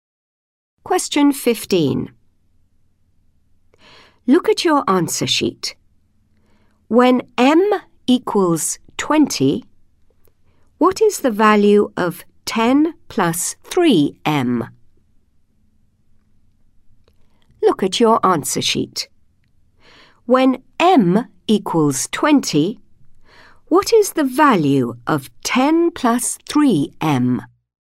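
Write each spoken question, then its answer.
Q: When M equals 20, what is the value of 10 plus 3M?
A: 70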